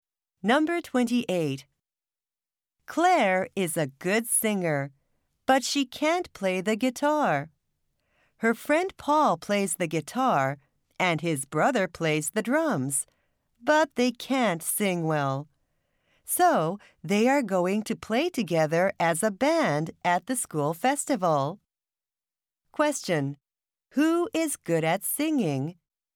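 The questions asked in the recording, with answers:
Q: Who is good at singing?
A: Claire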